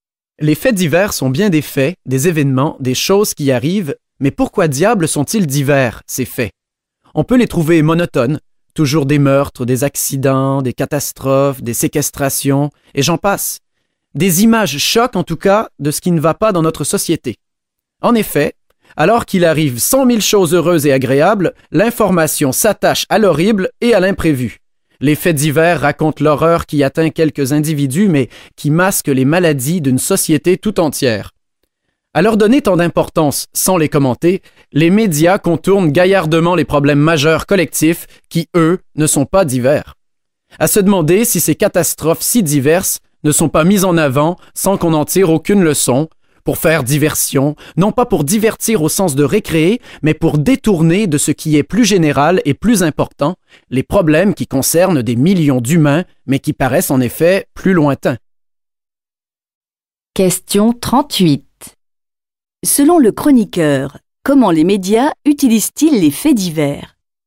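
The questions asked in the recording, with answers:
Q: Selon le chroniqueur, comment les médias utilisent-ils les faits divers?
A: Pour faire diversion : ils les mettent en avant sans les commenter afin de détourner l'attention des problèmes collectifs majeurs.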